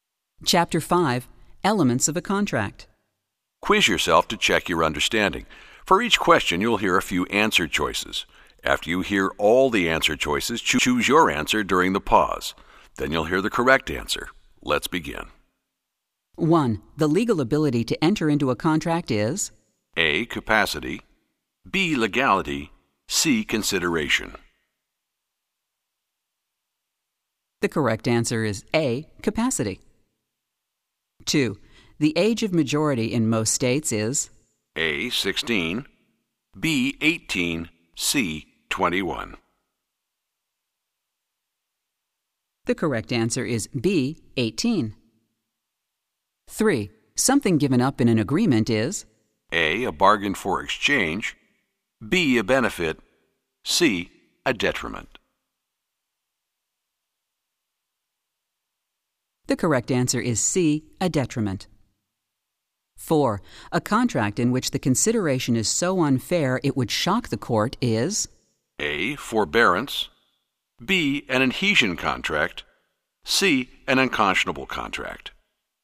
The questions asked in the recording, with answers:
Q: The legal ability to enter into a contract is?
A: The correct answer is A. Capacity.

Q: The age of majority in most states is?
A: The correct answer is B.

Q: Something given up in an agreement is?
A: The correct answer is C. A detriment.